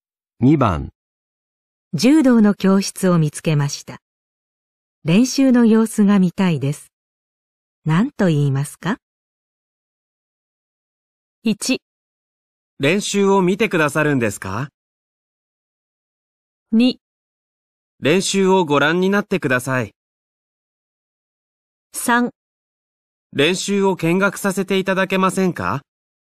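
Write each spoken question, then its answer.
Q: 柔道の教室を見つけました。練習の様子が見たいです。何と言いますか?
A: 3: 練習を見学させていただけませんか?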